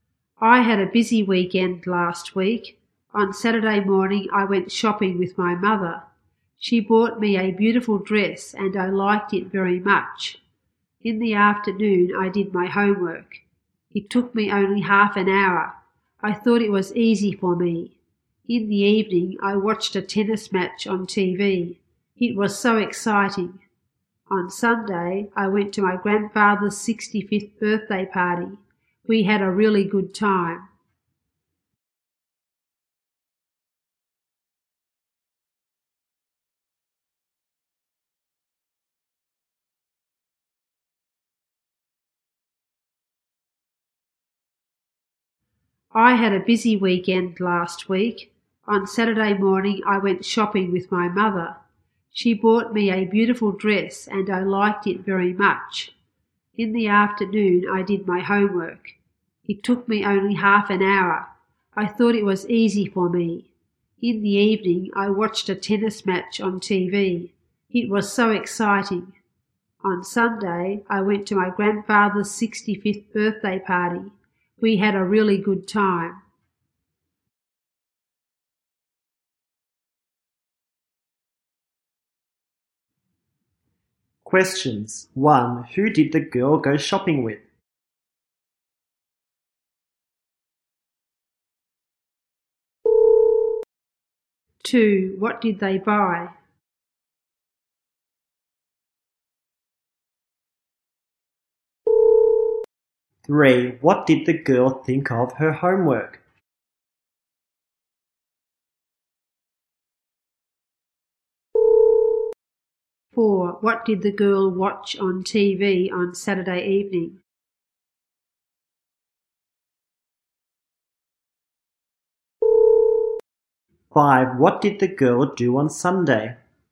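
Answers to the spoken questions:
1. Her mother
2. A beautiful dress
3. It was easy
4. A tennis match
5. She went to her grandfather's 65th birthday party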